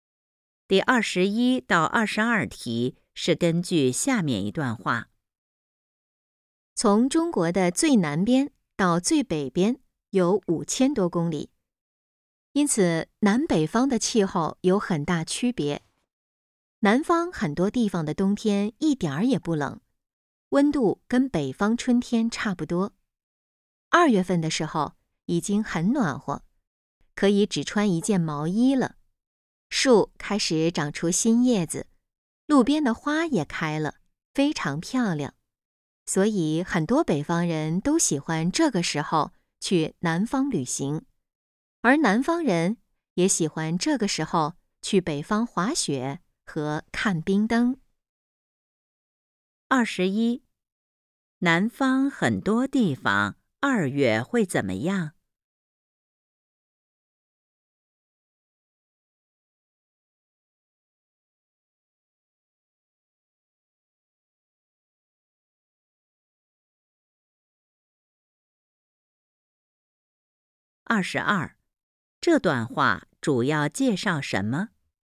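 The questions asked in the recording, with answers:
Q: 南方很多地方二月会怎么样?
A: 已经很暖和,只穿一件毛衣就行

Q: 这段话主要介绍什么?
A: 中国南北方气候的区别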